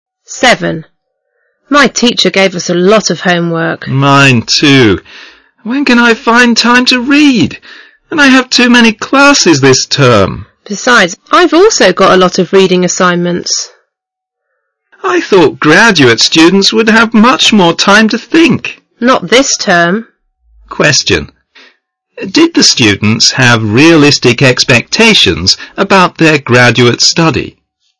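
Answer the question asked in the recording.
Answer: No, they expected to have much more time to think but are overloaded with work.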